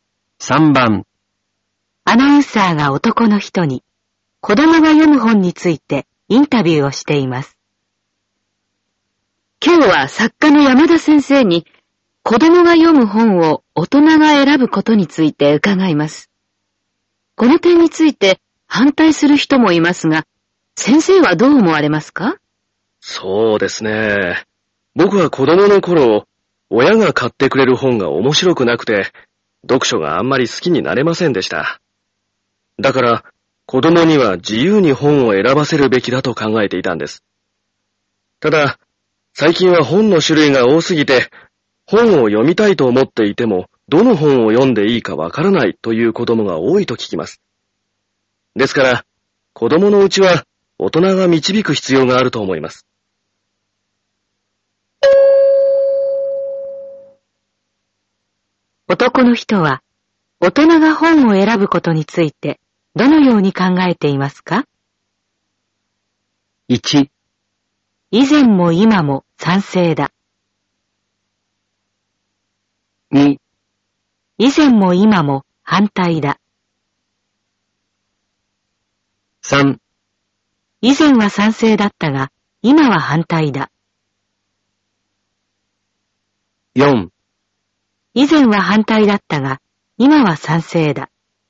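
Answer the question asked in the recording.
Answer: 4: 以前は反対だったが、今は賛成だ。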